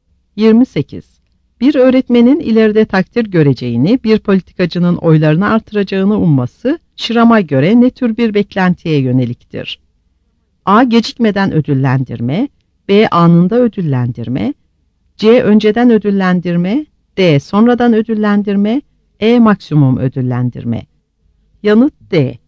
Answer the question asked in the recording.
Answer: Yanıt D.